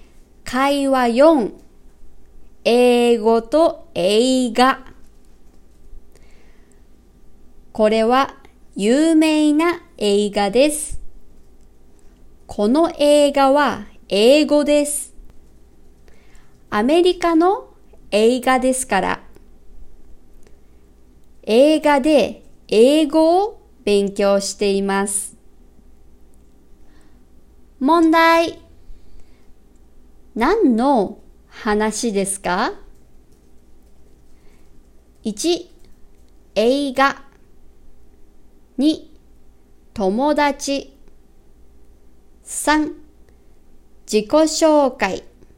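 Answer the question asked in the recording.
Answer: 1: 映画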